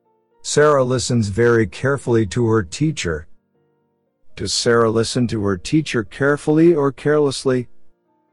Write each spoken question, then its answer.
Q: Does Sarah listen to her teacher carefully or carelessly?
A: Carefully.